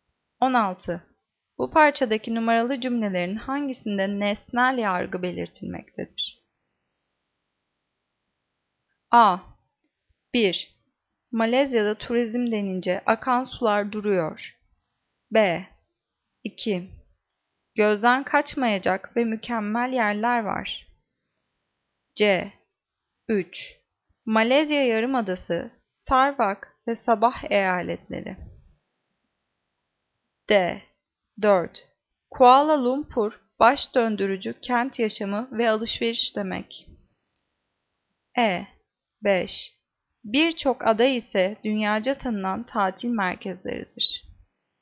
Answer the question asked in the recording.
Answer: Cevap C. 3. Malezya Yarımadası, Sarawak ve Sabah eyaletleri.